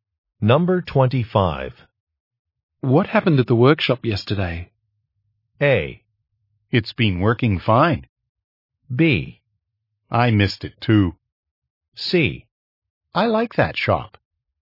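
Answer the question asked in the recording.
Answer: B: I missed it too.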